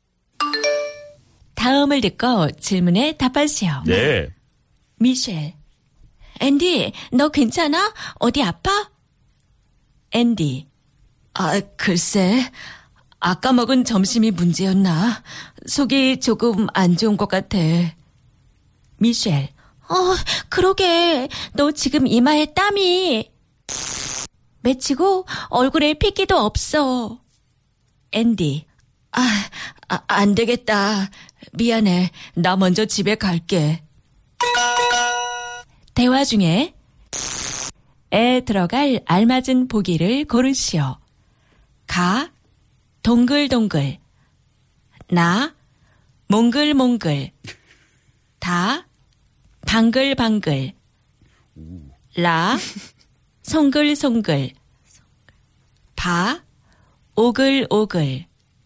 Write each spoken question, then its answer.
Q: 대화 중에 에 들어갈 알맞은 보기를 고르시오.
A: La, 너 지금 이마에 땀이 송글송글 맺혔어.